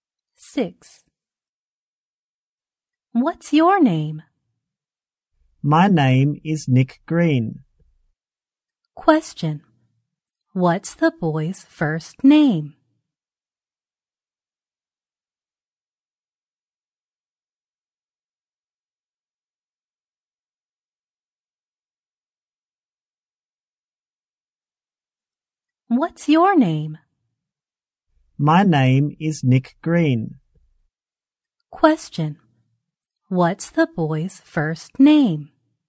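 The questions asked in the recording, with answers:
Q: What's the boy's first name?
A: Nick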